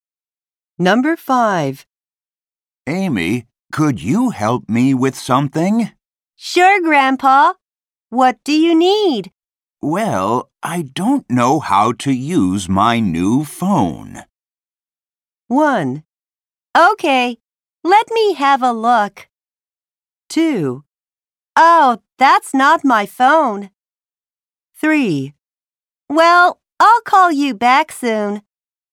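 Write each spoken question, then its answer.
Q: Well, I don't know how to use my new phone.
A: 1: Okay, let me have a look.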